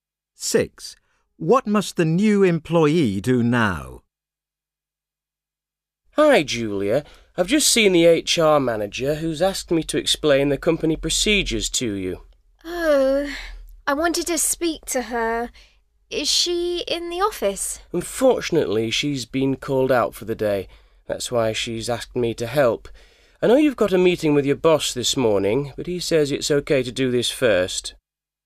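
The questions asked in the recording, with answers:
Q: What must the new employee do now?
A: Learn the company procedures from a colleague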